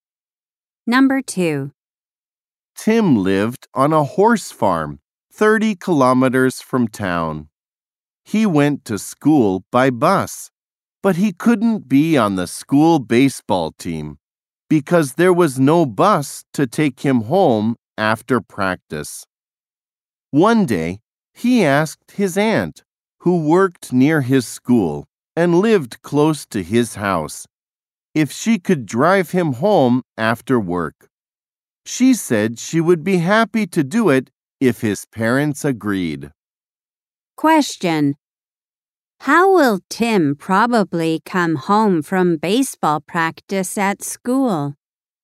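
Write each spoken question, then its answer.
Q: How will Tim probably come home from baseball practice at school?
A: His aunt will drive him home.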